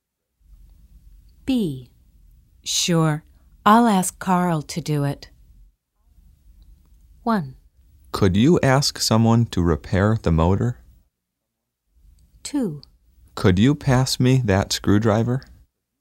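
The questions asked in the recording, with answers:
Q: Sure, I'll ask Carl to do it.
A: 1: Could you ask someone to repair the motor?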